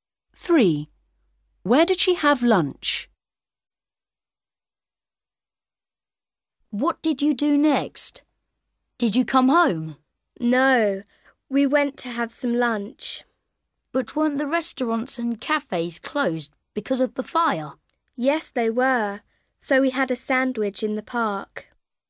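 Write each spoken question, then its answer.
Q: Where did she have lunch?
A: in the park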